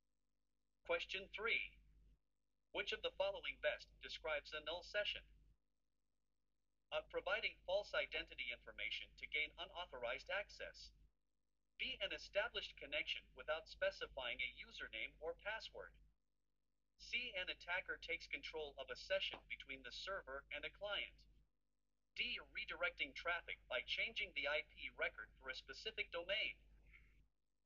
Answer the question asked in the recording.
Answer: The correct answer is B.